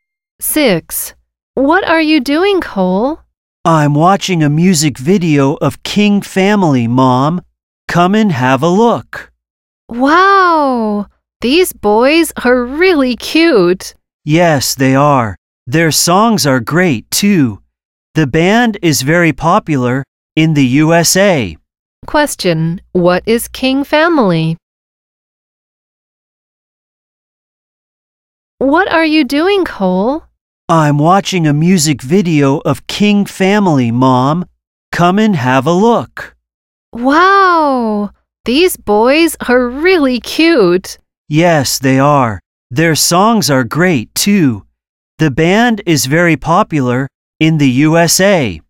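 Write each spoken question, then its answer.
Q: What is King Family?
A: A band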